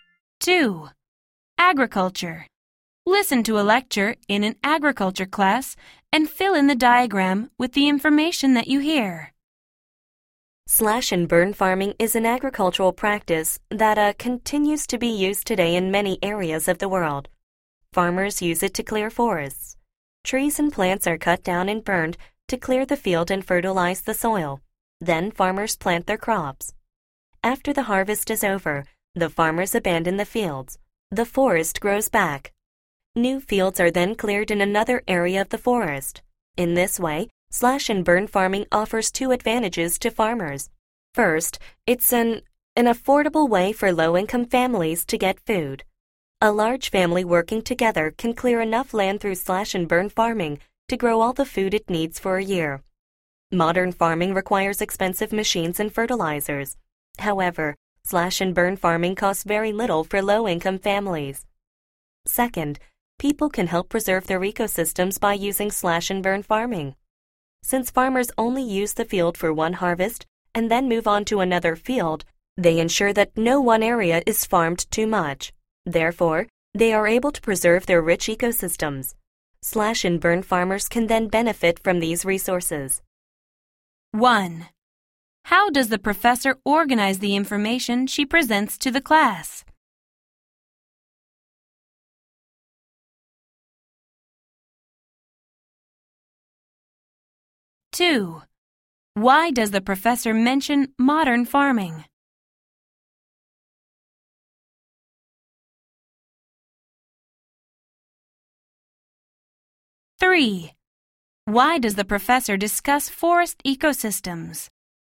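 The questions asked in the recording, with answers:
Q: How does the professor organize the information she presents to the class?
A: She describes slash and burn farming, then explains its two advantages

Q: Why does the professor mention modern farming?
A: To contrast its high cost with the low cost of slash and burn farming

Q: Why does the professor discuss forest ecosystems?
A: To explain the second advantage: slash and burn farming helps preserve ecosystems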